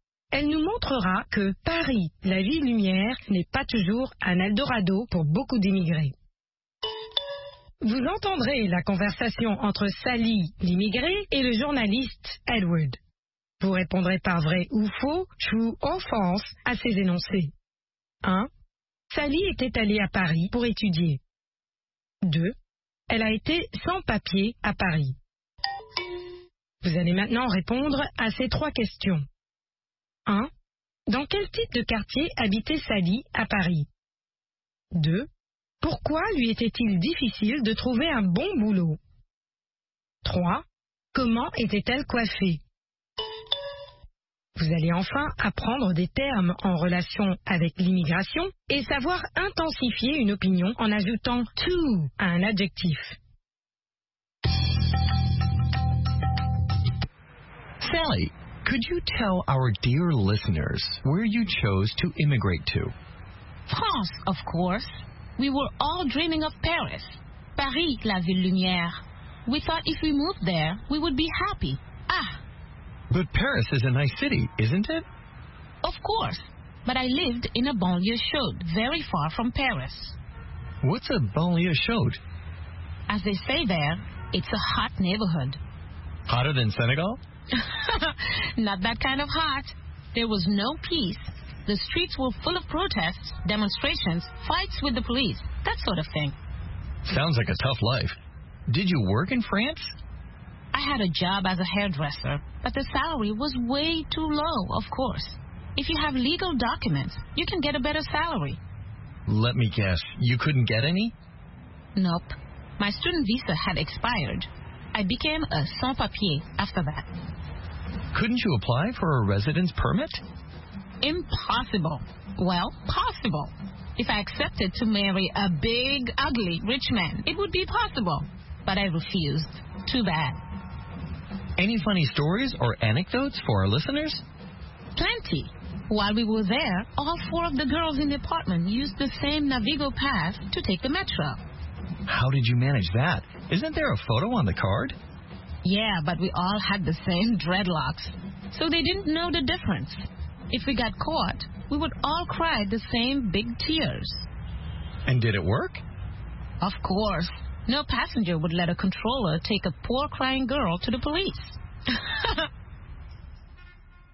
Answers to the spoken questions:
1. L'énoncé 1 est vrai. Sally était allée à Paris pour étudier.
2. L'énoncé 2 est vrai. Elle a été sans papier à Paris.
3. Dans une banlieue chaude.
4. Elle était sans papier.
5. En dreadlocks.